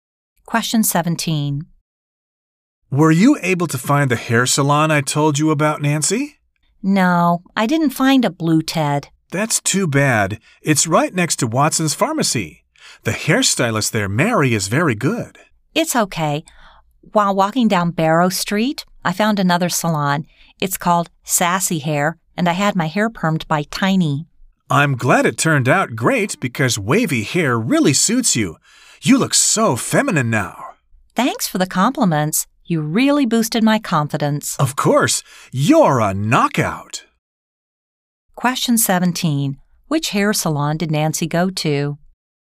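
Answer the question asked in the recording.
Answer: Sassy Hair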